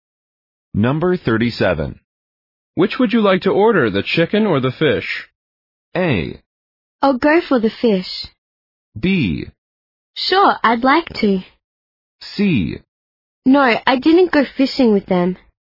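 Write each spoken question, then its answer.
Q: Which would you like to order, the chicken or the fish?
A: A: I'll go for the fish.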